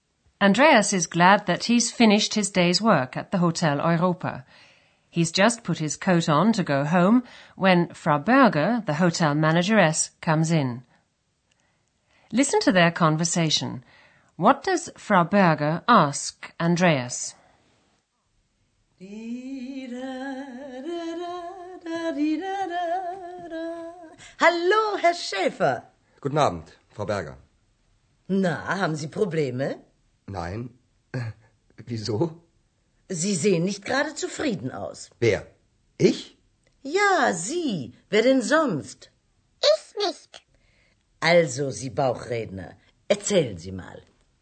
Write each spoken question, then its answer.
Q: What does Frau Berger ask Andreas?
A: She asks him if he has problems.